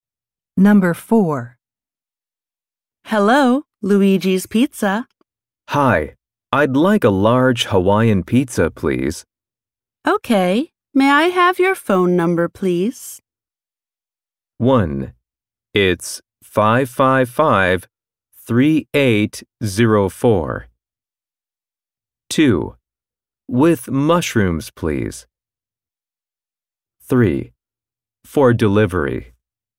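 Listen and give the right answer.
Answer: 1: It's 555 3804.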